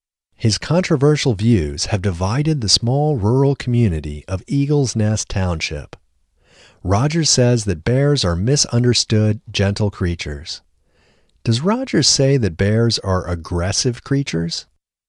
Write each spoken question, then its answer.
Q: Does Rogers say that bears are aggressive creatures?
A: No, Rogers doesn't say that bears are aggressive creatures.